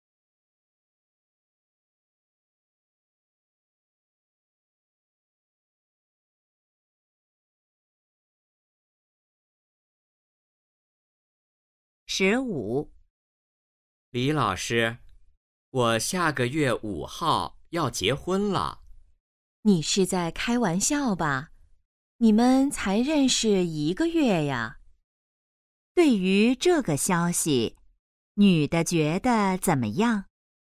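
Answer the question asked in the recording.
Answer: 很吃惊,不相信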